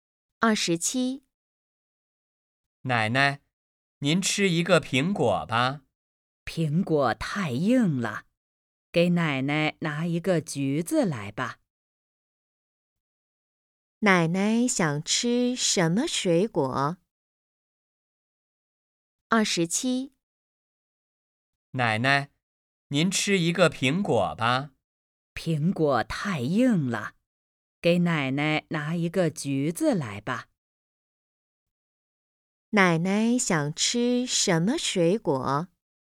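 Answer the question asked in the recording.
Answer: 橘子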